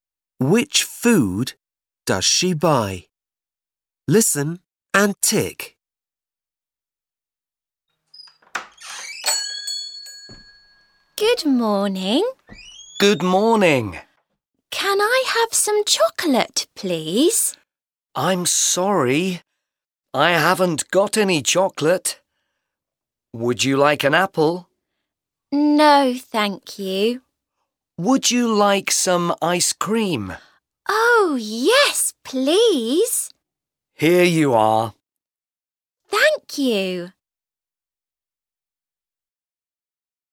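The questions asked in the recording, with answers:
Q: Which food does she buy?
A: ice cream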